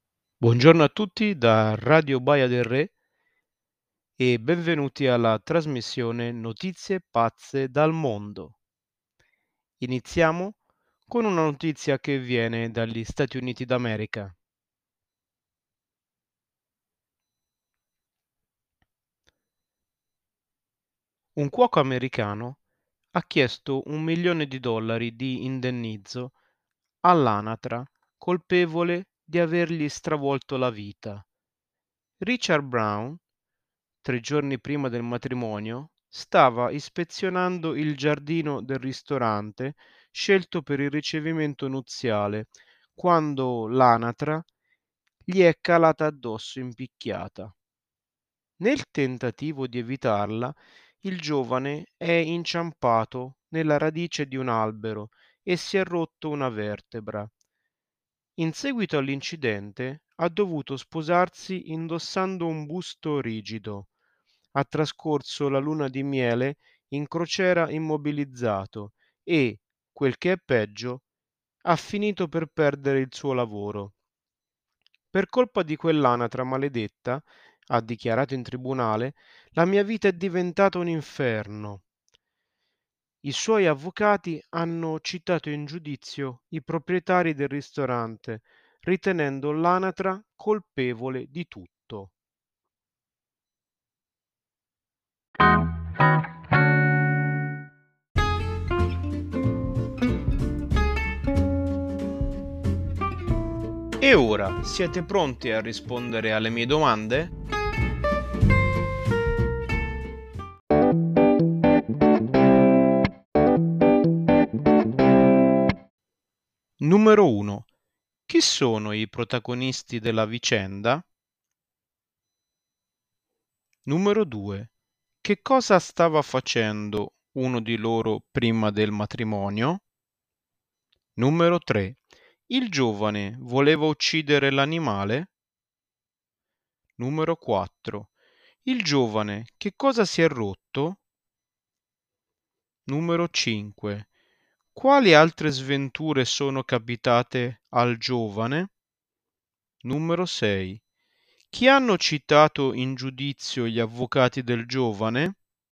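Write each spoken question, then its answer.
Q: chi sono i protagonisti della vicenda?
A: Un cuoco americano, Richard Brown, e un'anatra

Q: che cosa stava facendo uno di loro prima del matrimonio?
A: Stava ispezionando il giardino del ristorante scelto per il ricevimento nuziale

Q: il giovane voleva uccidere l'animale?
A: No, cercava di evitarla

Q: Il giovane che cosa si è rotto?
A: Una vertebra

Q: Quali altre sventure sono capitate al giovane?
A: Si è sposato con un busto rigido, ha passato la luna di miele immobilizzato e ha perso il lavoro

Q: Chi hanno citato in giudizio gli avvocati del giovane?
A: I proprietari del ristorante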